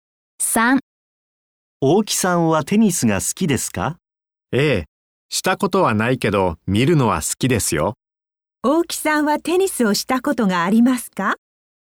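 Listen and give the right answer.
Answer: いいえ、ありません。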